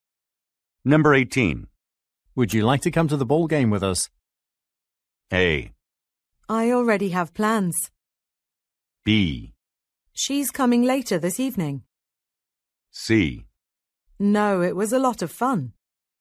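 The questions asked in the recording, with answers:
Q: Would you like to come to the ball game with us?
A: A: I already have plans.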